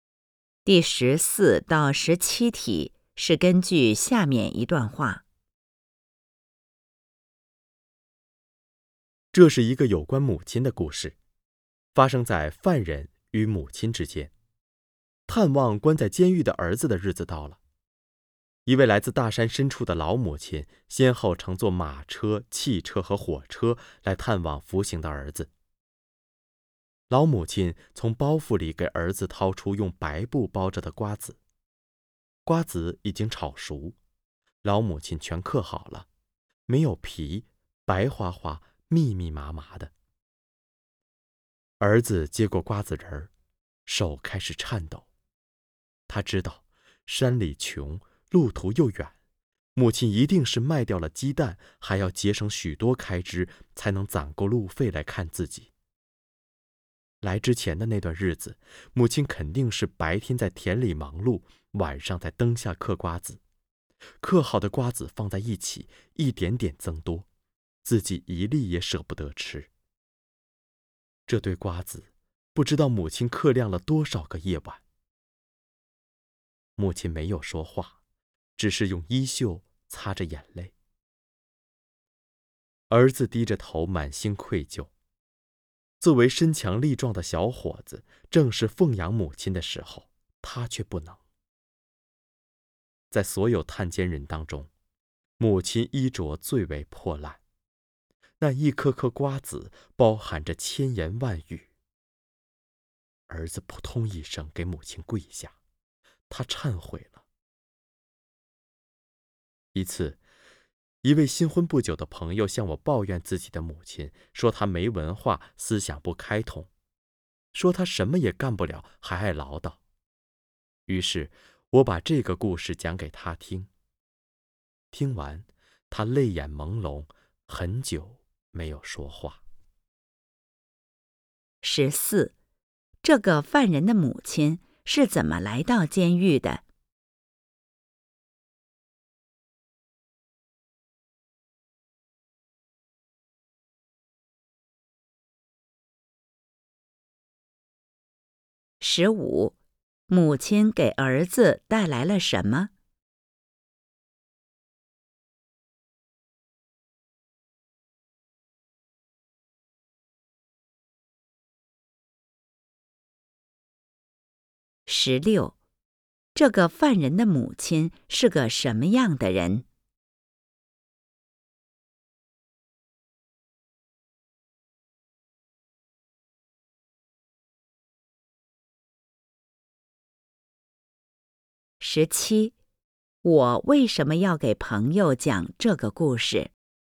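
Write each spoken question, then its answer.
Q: 这个犯人的母亲是怎么来到监狱的?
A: 先后乘坐马车、汽车和火车

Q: 母亲给儿子带来了什么?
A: 嗑好的瓜子仁

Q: 我为什么要给朋友讲这个故事?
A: 因为朋友抱怨自己的母亲,想让他体会母爱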